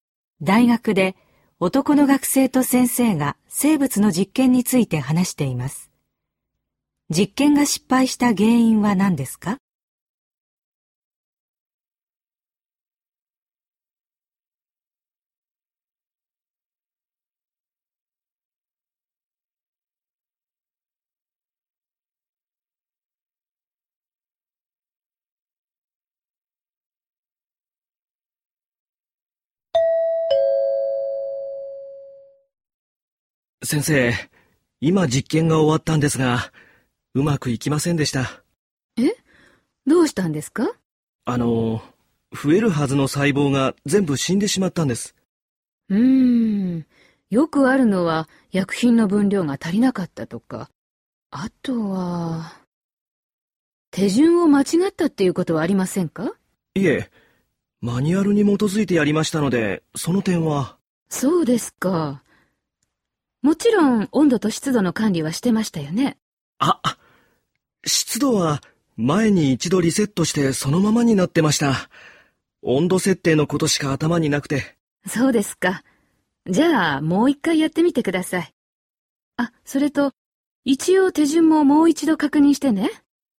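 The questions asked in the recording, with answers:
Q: 実験が失敗した原因は何ですか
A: 湿度の管理をしていなかったこと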